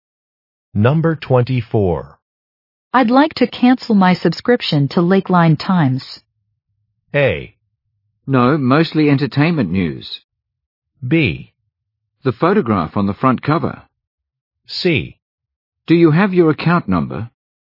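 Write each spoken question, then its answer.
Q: I'd like to cancel my subscription to Lakeline Times.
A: C: Do you have your account number?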